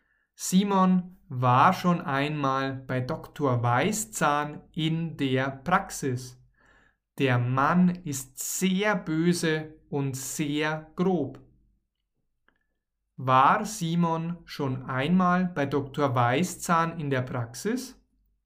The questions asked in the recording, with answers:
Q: War Simon schon einmal bei Dr.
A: Ja, er war schon einmal bei Dr.